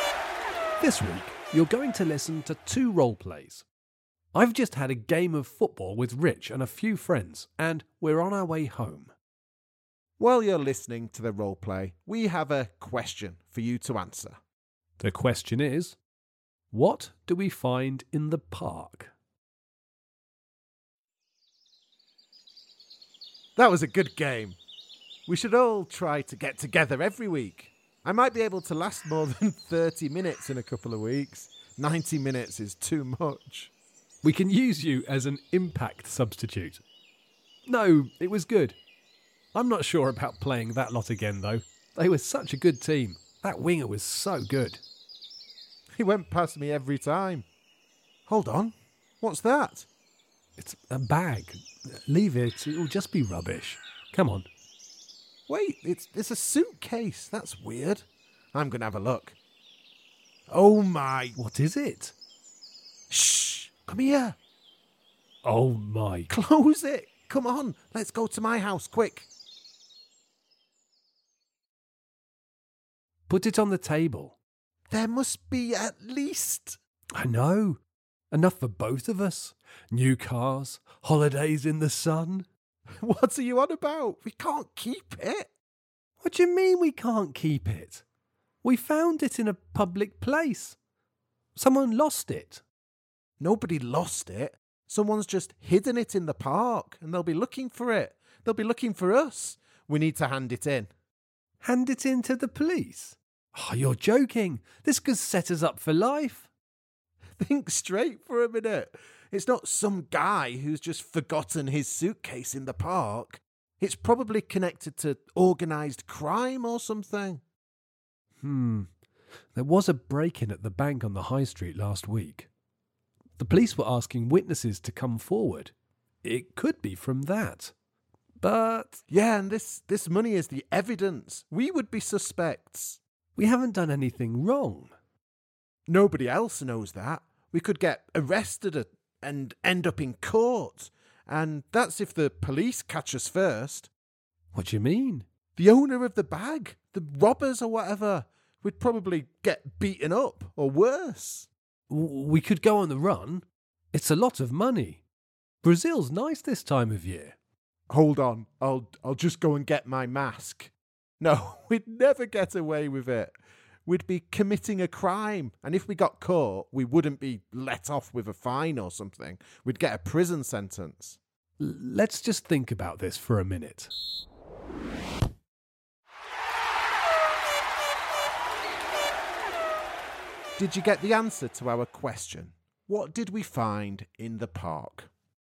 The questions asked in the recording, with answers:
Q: What did we find in the park?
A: The answer is a lot of money.